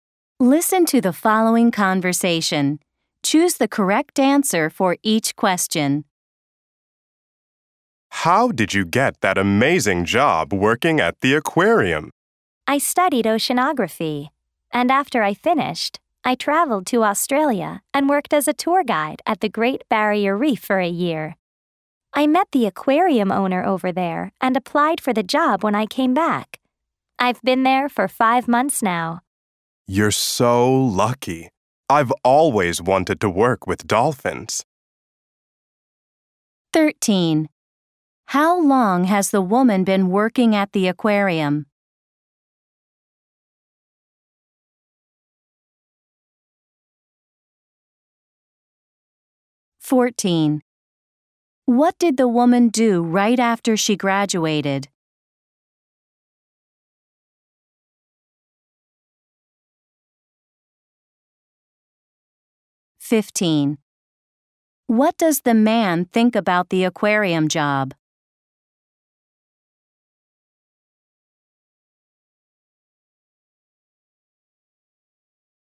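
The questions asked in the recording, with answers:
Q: How long has the woman been working at the aquarium?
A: 5 months

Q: What did the woman do right after she graduated?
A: She went to Australia and worked as a tour guide at the Great Barrier Reef

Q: What does the man think about the aquarium job?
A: He thinks she is lucky; he has always wanted to work with dolphins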